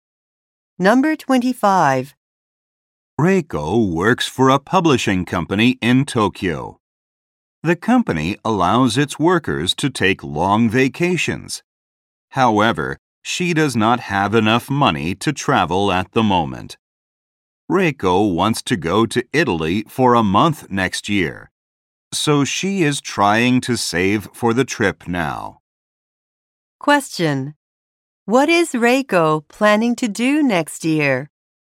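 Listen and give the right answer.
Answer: Go to Italy for a month.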